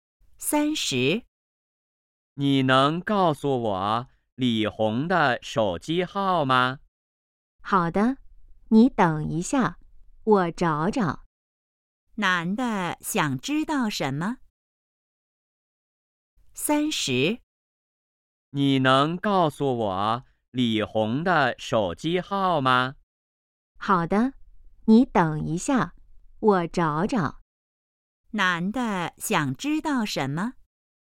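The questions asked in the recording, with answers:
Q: 男的想知道什么?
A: 李红的手机号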